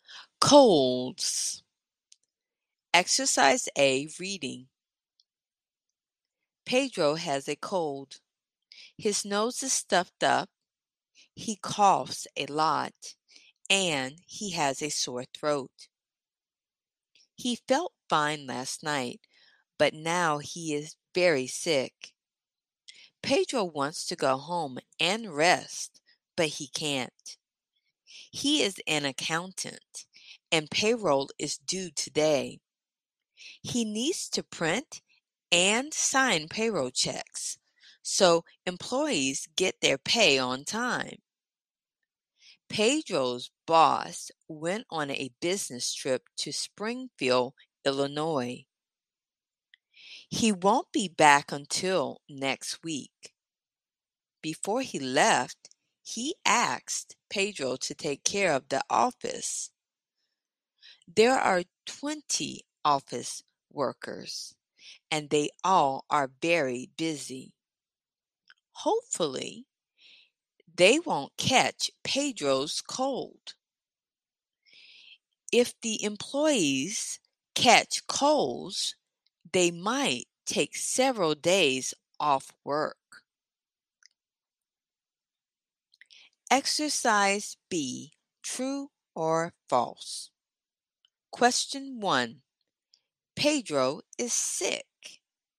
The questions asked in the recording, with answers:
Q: Pedro is sick.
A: True. Pedro is very sick.